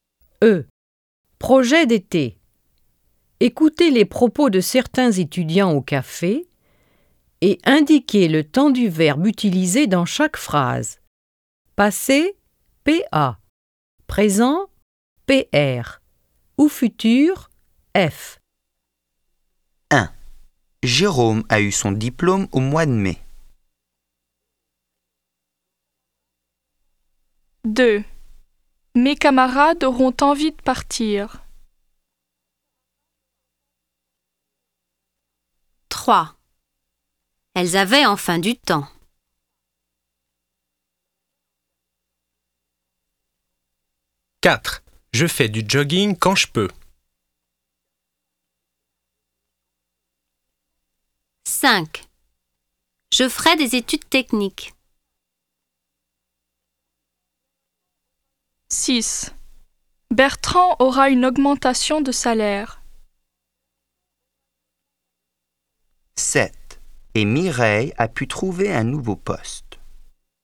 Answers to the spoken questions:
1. 1. Passé.
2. 2. Futur.
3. 3. Passé.
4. 4. Présent.
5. 5. Futur.
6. 6. Futur.
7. 7. Passé.